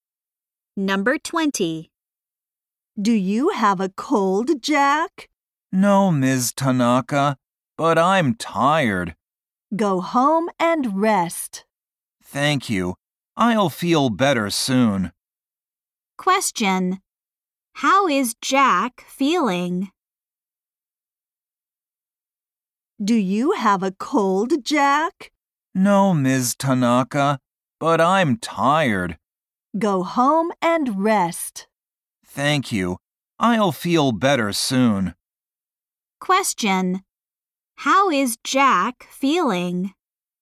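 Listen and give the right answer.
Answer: Tired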